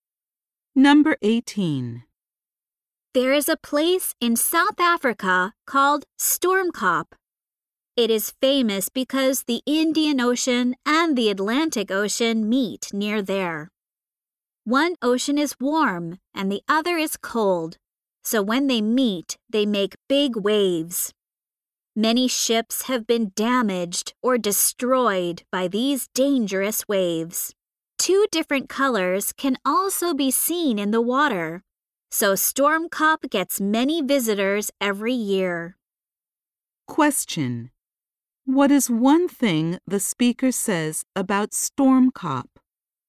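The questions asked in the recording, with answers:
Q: what is one thing the speaker says about Stormkop?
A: Two oceans meet there and make big, dangerous waves.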